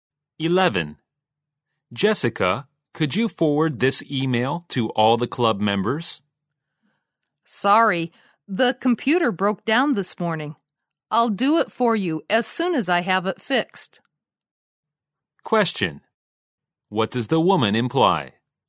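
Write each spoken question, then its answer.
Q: What does the woman imply?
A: She can't forward the email until the computer is fixed.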